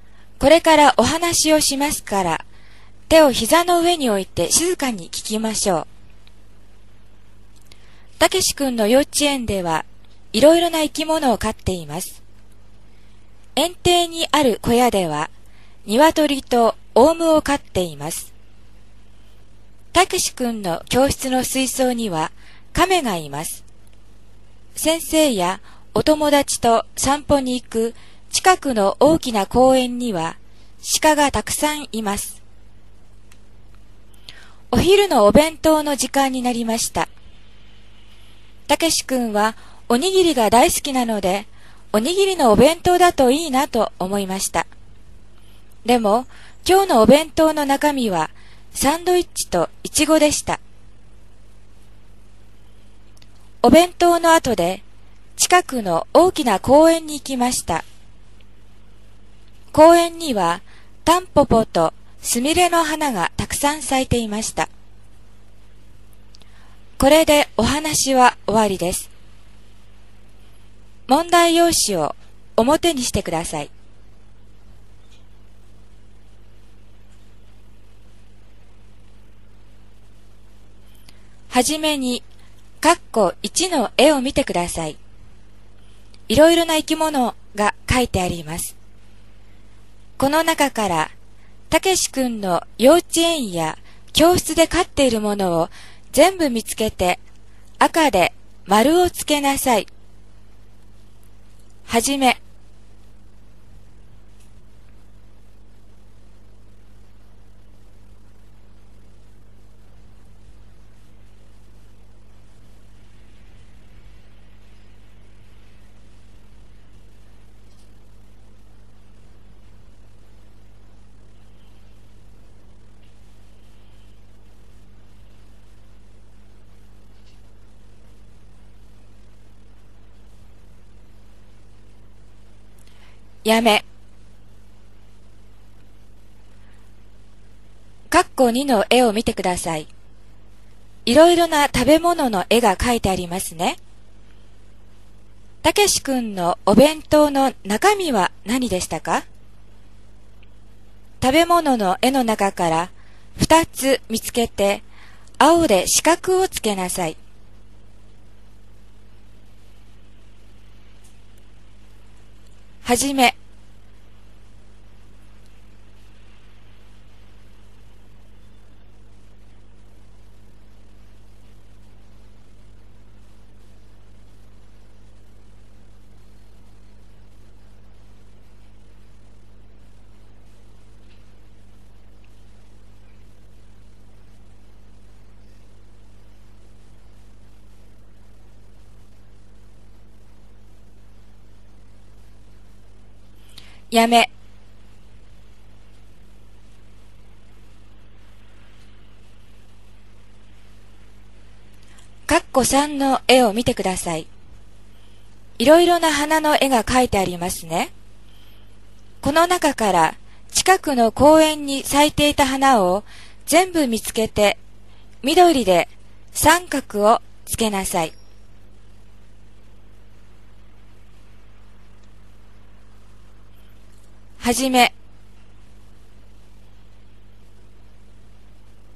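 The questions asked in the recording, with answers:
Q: この中から、たけし君の幼稚園や教室で飼っているものを全部見つけて、赤で丸をつけなさい。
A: 鶏、オウム、亀

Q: たけし君のお弁当の中身は何でしたか?食べ物の絵の中から2つ見つけて、青で四角をつけなさい。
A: サンドイッチとイチゴ

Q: この中から近くの公園に咲いていた花を全部見つけて、緑で三角をつけなさい。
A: タンポポとスミレ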